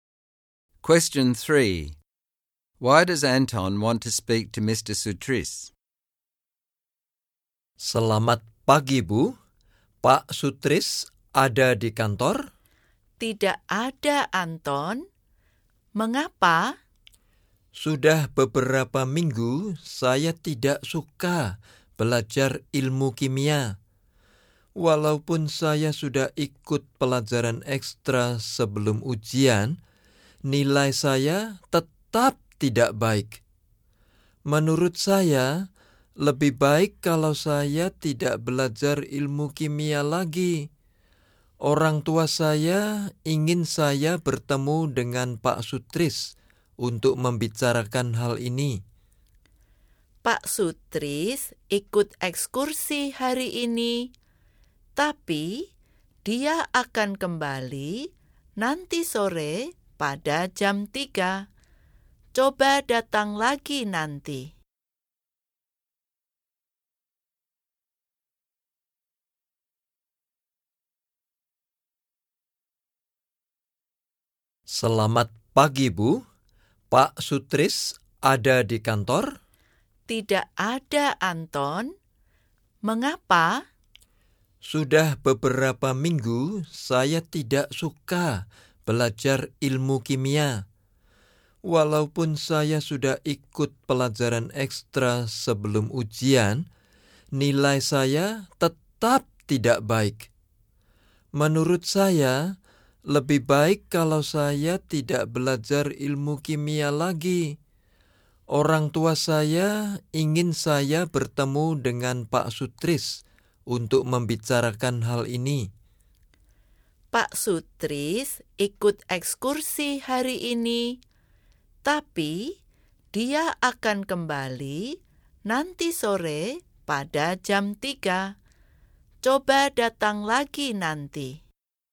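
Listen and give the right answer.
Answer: He wants to stop studying chemistry. He has disliked it for weeks, and his marks are still poor even after extra lessons. His parents want him to discuss this with Mr Sutris.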